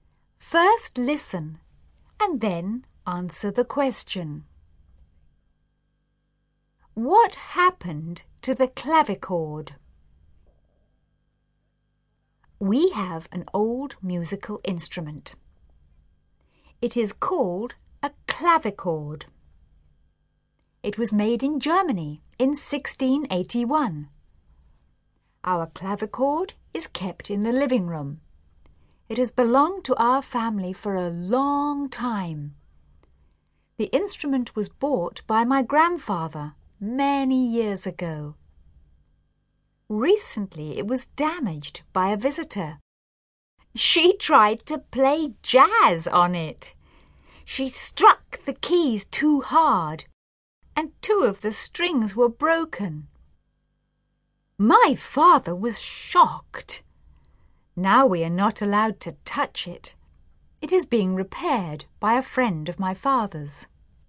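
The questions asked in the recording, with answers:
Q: What happened to the clavichord?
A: It was damaged by a visitor who played jazz on it too hard and broke two strings; now it is being repaired.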